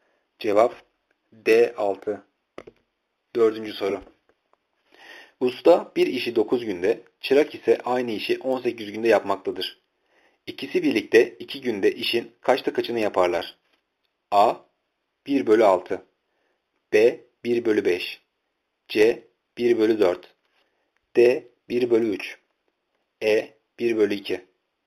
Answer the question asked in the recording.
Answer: Cevap D 1 bölü 3.